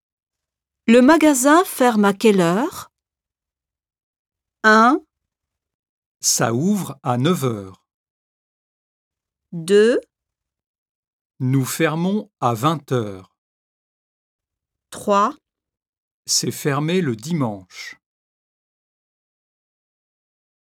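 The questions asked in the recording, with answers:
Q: Le magasin ferme à quelle heure?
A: 2: Nous fermons à 20 heures.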